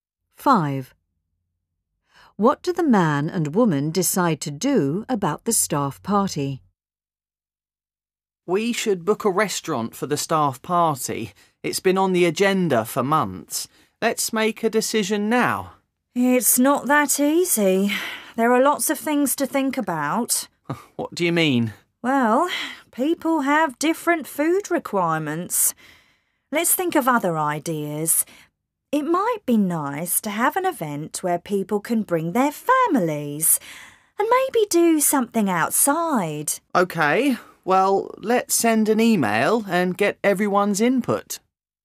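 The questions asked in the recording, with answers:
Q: What do the man and woman decide to do about the staff party?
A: Send an email to get everyone's ideas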